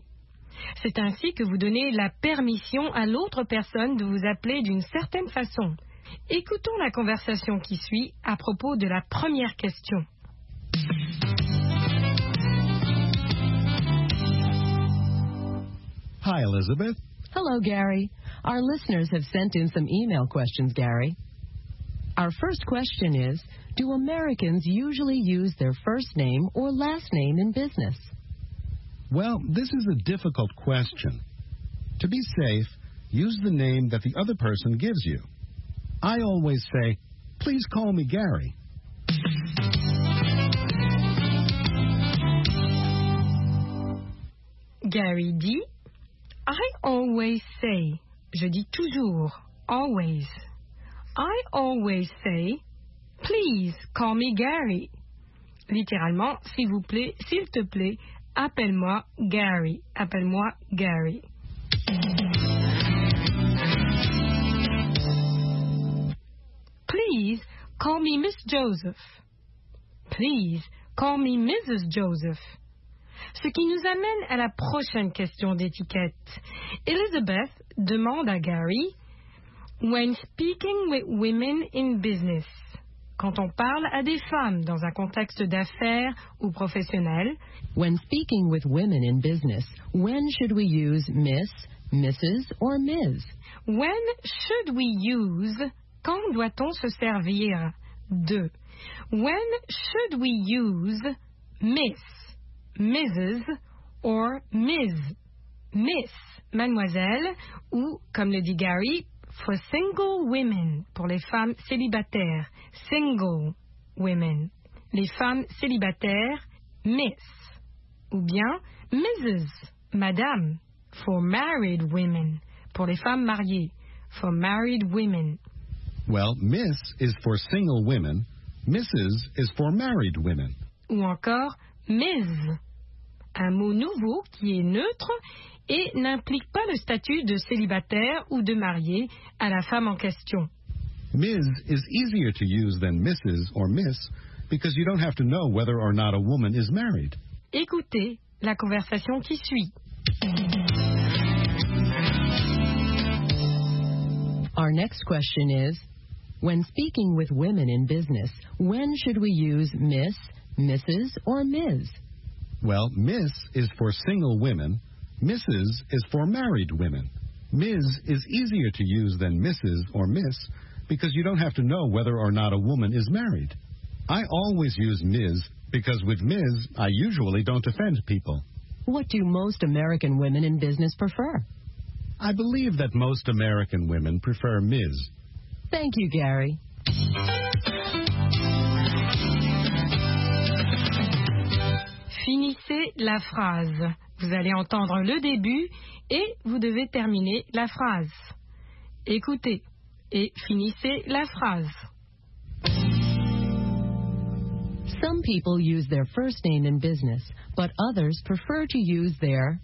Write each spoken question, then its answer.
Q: Some people use their first name in business, but others prefer to use their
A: last name.